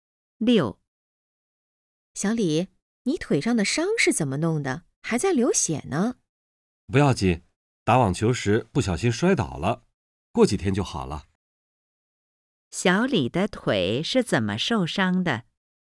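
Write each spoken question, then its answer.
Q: 小李的腿是怎么受伤的?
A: 打网球时不小心摔倒了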